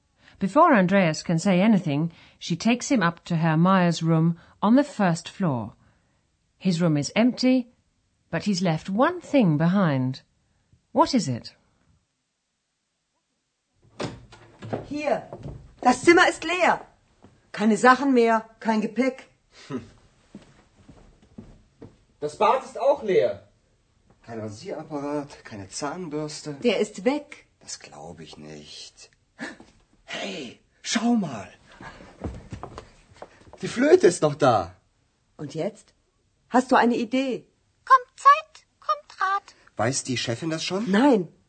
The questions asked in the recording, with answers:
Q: What is it?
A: The only thing Herr Meyer has left behind in his room is his flute.